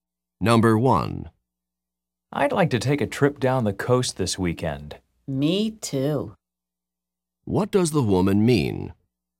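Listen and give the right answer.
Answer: She would also like to take a trip down the coast this weekend.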